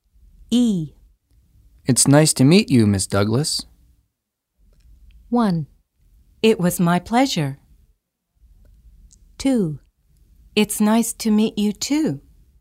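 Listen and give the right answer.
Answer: 2: It's nice to meet you, too.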